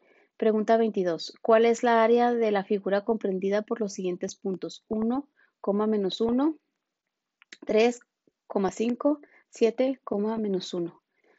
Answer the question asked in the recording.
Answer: Y la respuesta correcta es la A, 18U al cuadrado.